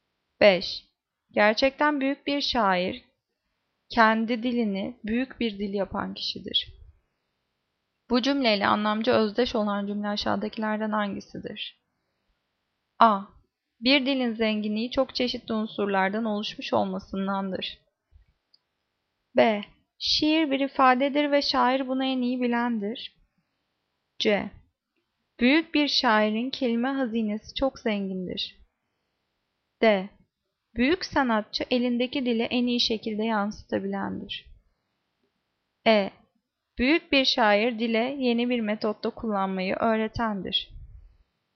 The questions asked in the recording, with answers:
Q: Bu cümleyle anlamca özdeş olan cümle aşağıdakilerden hangisidir?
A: Cevap D. Büyük sanatçı elindeki dili en iyi şekilde yansıtabilendir.